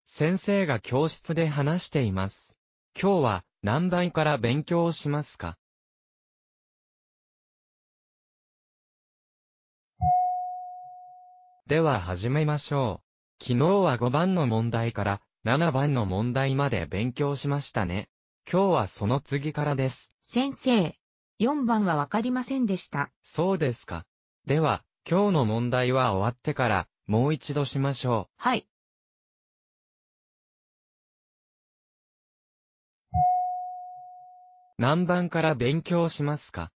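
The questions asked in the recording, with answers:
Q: 何番から勉強しますか?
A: 8番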